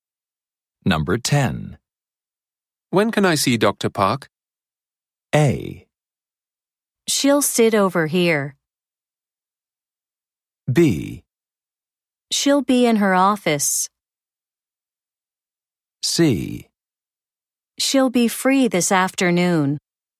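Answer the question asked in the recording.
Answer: C: She'll be free this afternoon.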